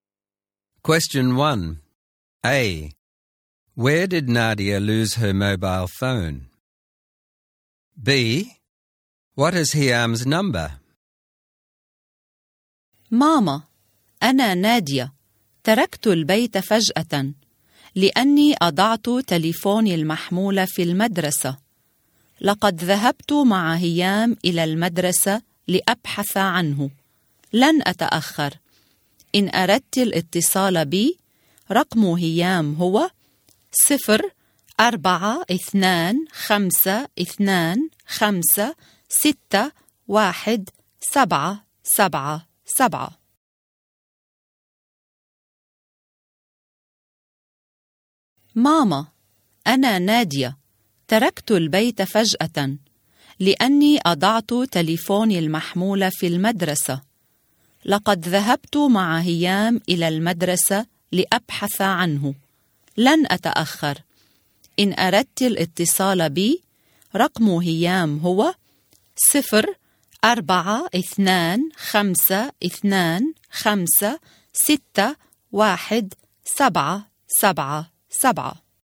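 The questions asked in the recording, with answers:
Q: Where did Nadia lose her mobile phone?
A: At school

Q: What is Hiam's number?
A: 0425 251 777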